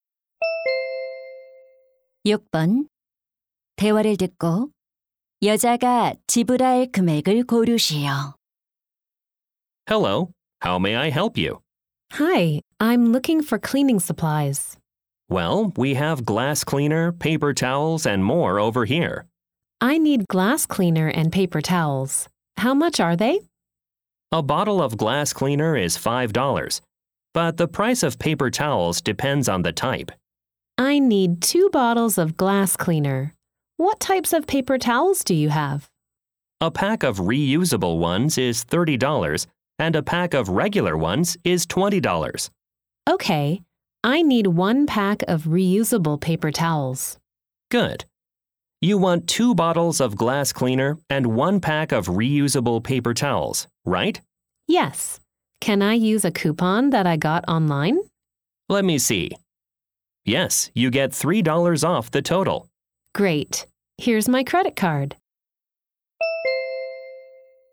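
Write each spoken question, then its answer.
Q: 대화를 듣고 여자가 지불할 금액을 고르시오.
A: $37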